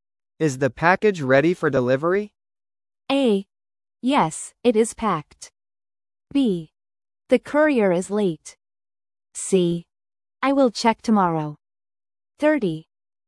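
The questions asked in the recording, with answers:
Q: Is the package ready for delivery?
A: A: Yes, it is packed.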